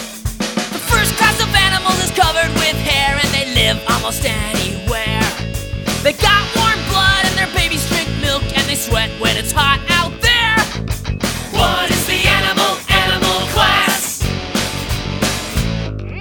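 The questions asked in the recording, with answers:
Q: What is the animal?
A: Mammals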